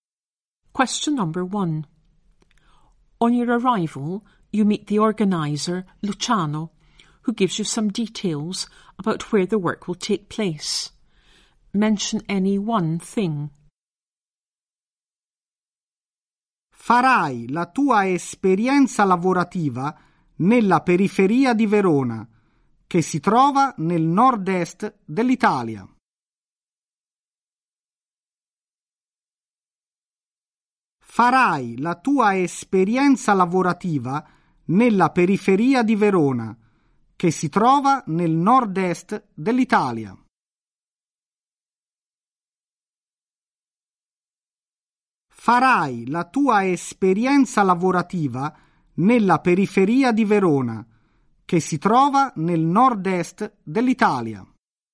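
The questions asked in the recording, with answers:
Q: On your arrival, you meet the organizer, Luciano, who gives you some details about where the work will take place.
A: On the outskirts of Verona, in the north-east of Italy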